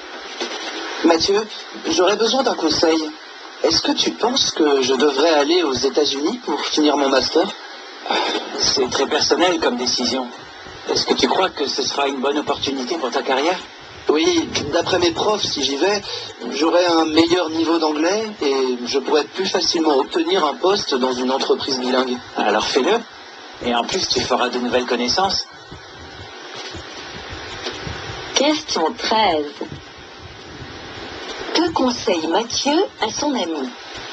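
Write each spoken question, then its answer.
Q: Que conseille Mathieu à son ami?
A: D'aller aux États-Unis pour finir son master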